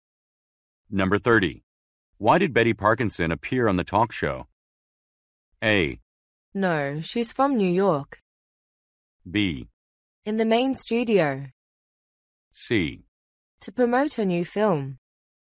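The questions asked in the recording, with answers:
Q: Why did Betty Parkinson appear on the talk show?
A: C: To promote her new film.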